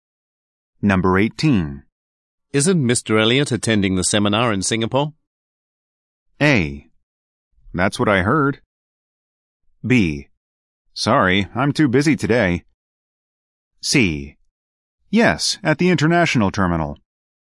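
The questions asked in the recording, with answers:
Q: Isn't Mr. Elliot attending the seminar in Singapore?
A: A: That's what I heard.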